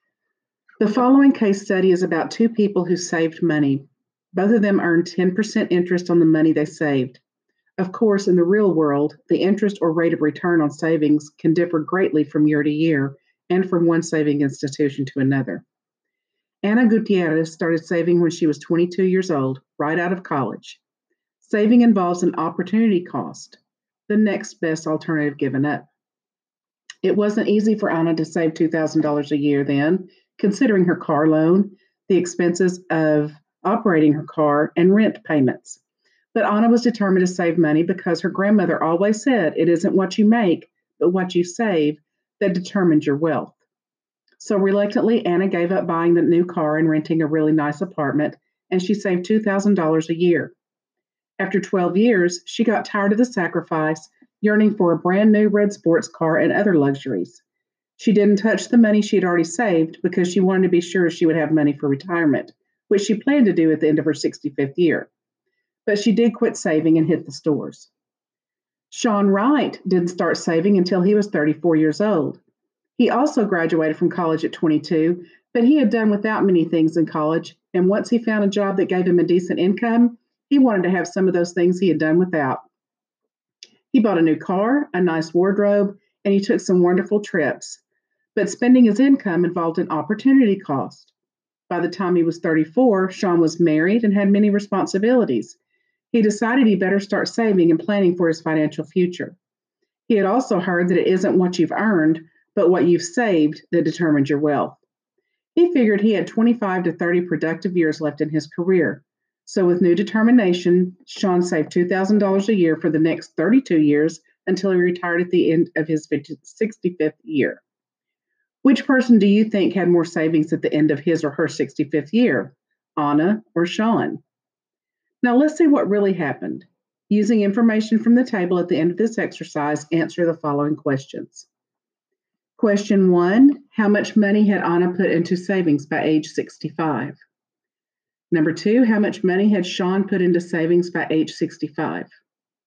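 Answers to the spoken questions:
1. $24,000 ($2,000 a year for 12 years)
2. $64,000 ($2,000 a year for 32 years)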